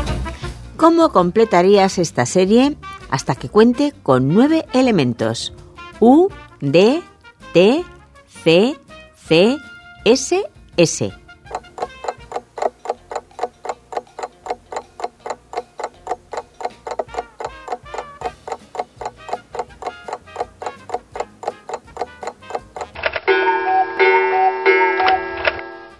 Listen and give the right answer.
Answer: Solución. Lo siguiente serían las letras O y N.